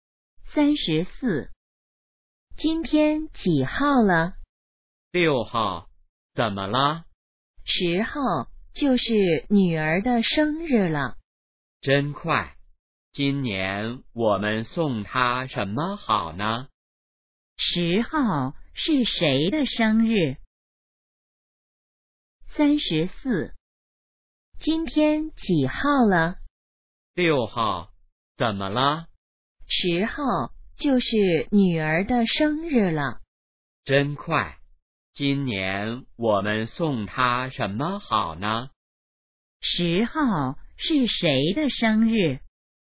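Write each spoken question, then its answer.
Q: 10号是谁的生日?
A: 女儿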